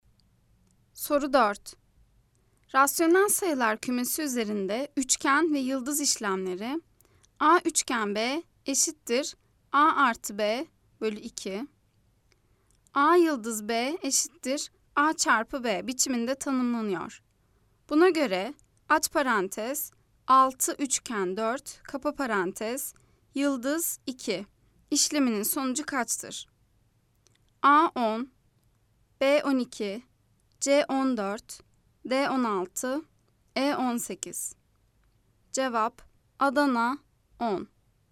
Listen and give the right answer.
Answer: Cevap Adana 10.